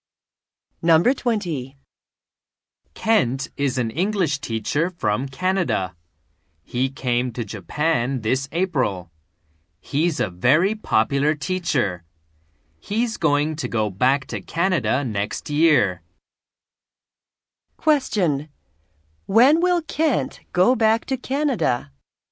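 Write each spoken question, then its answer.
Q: When will Kent go back to Canada?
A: Next year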